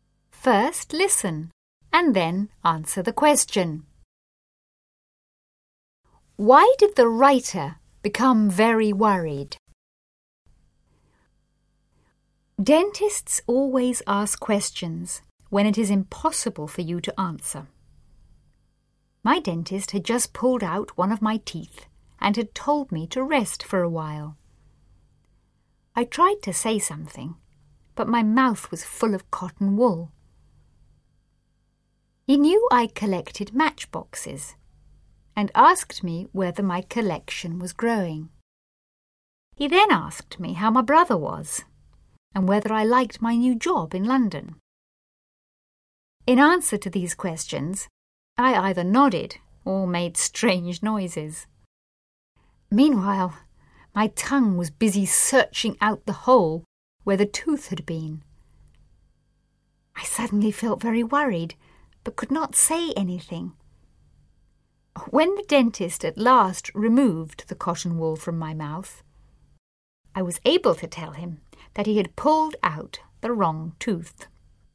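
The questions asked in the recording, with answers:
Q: Why did the writer become very worried?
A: Because the dentist had pulled out the wrong tooth.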